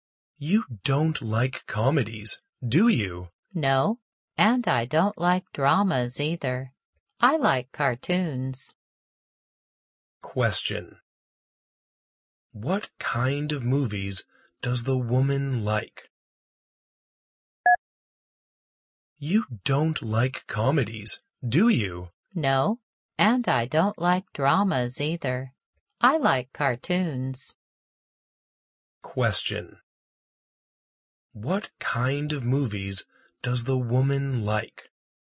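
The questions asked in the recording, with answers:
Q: What kind of movies does the woman like?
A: Cartoons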